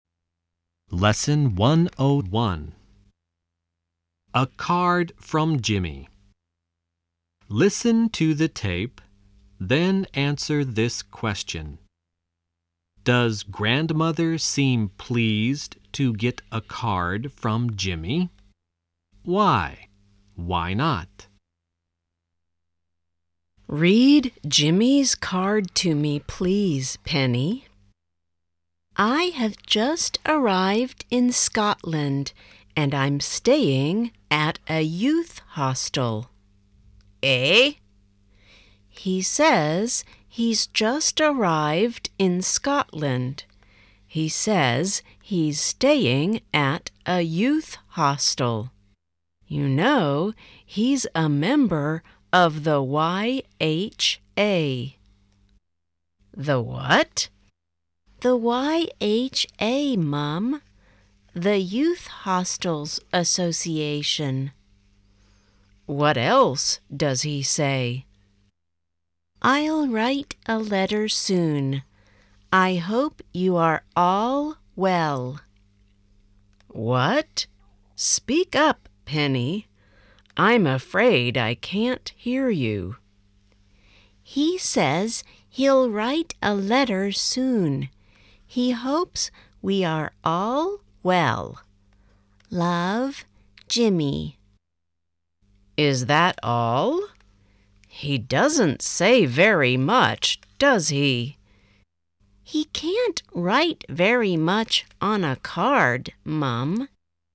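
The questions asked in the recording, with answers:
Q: Does grandmother seem pleased to get a card from Jimmy?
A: No, she thinks he doesn't say very much on the card.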